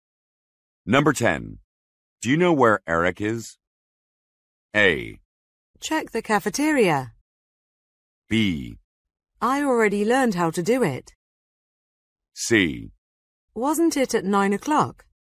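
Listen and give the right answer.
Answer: A: Check the cafeteria.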